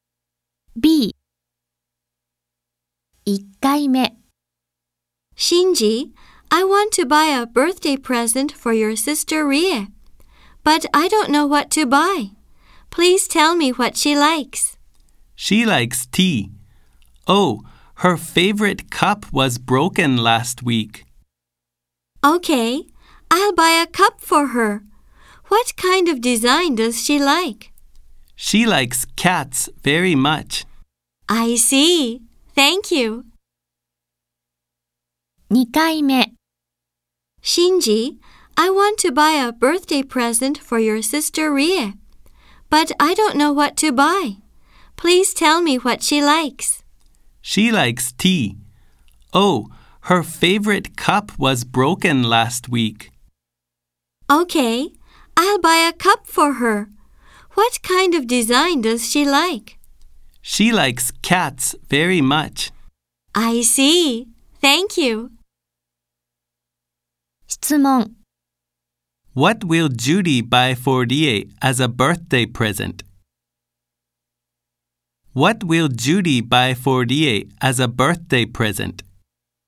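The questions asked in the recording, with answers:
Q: What will Judy buy for Rie as a birthday present?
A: A cup with a cat design.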